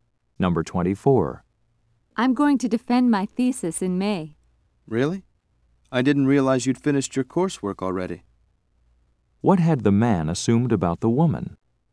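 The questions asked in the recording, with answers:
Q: What had the man assumed about the woman?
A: That she hadn't finished her coursework.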